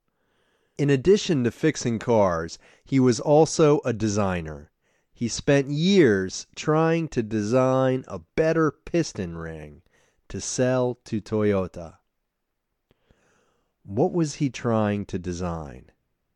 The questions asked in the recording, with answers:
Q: What was he trying to design?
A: He was trying to design a better piston ring.